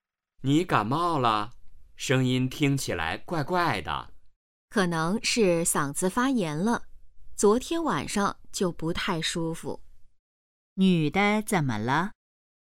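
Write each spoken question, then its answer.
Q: 女的怎么了?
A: 嗓子可能发炎了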